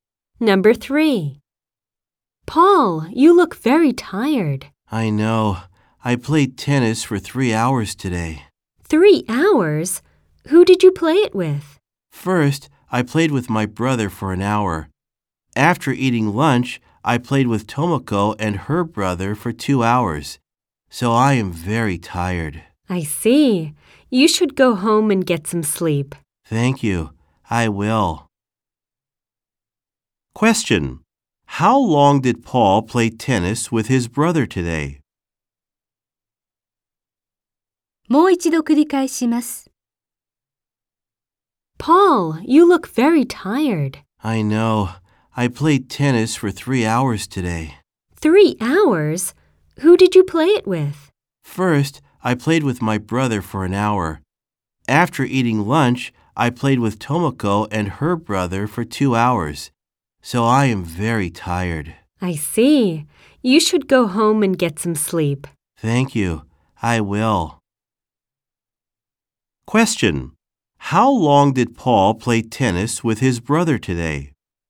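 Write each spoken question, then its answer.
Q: How long did Paul play tennis with his brother today?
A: For an hour.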